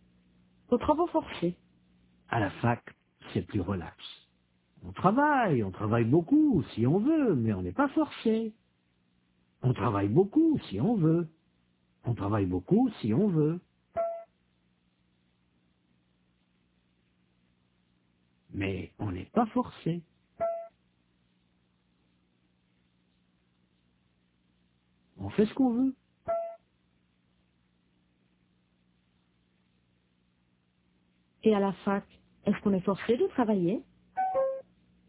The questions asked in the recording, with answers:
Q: Et à la fac, est-ce qu'on est forcé de travailler?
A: Non, on fait ce qu'on veut.